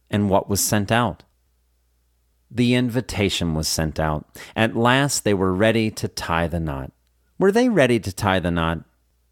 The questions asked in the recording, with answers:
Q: Were they ready to tie the knot?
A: Yes, at last, they were ready to tie the knot.